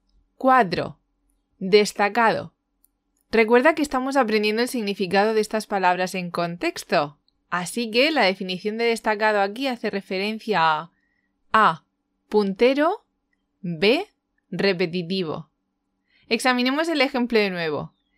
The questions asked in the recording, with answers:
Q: Destacado. Recuerda que estamos aprendiendo el significado de estas palabras en contexto, así que la definición de destacado aquí hace referencia a A.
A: Inditex cuenta con los ejecutivos más destacados o punteros de España, podríamos decir.